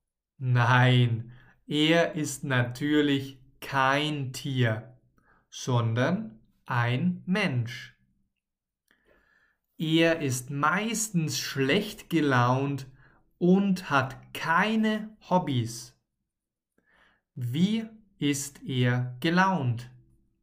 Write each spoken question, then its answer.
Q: Wie ist er gelaunt?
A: Schlecht. Er ist meistens schlecht gelaunt.